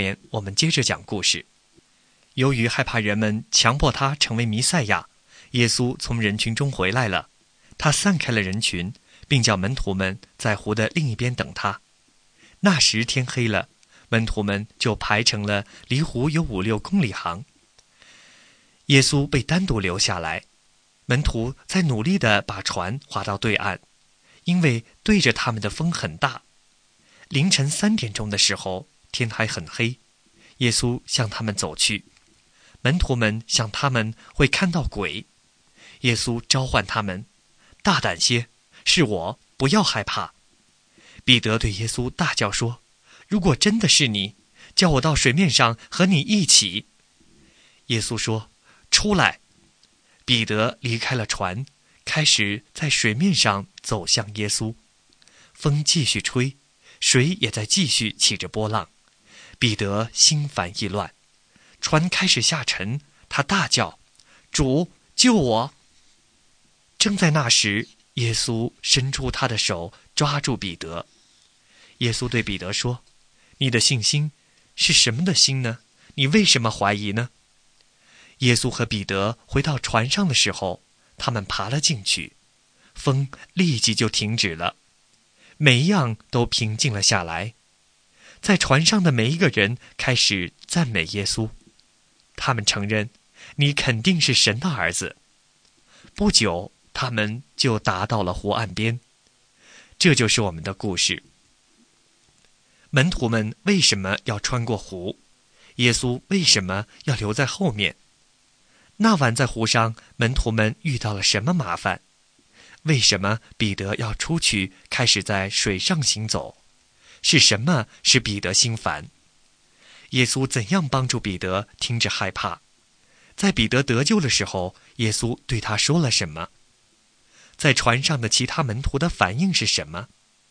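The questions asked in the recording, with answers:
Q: 门徒们为什么要穿过湖?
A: 耶稣叫他们到湖的另一边等他

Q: 那晚在湖上,门徒们遇到了什么麻烦?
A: 逆风很大,很难把船划到对岸

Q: 为什么彼得要出去开始在水上行走?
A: 他想确认是耶稣,耶稣叫他出来

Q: 是什么使彼得心烦?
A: 风继续吹,水起波浪

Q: 耶稣怎样帮助彼得停止害怕?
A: 伸出手抓住彼得

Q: 在彼得得救的时候,耶稣对他说了什么?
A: 你的信心为什么这么小?你为什么怀疑呢?

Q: 在船上的其他门徒的反应是什么?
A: 赞美耶稣,承认他是神的儿子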